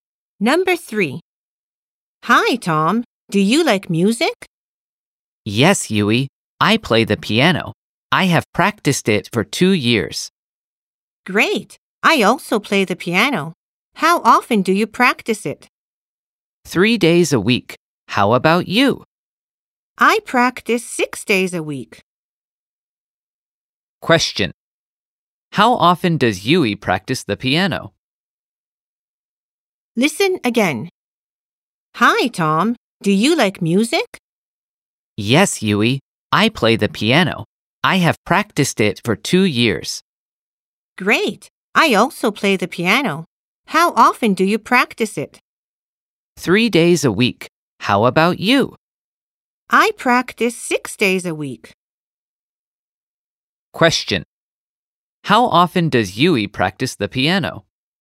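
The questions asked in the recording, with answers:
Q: How often does Yui practice the piano?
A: Six days a week.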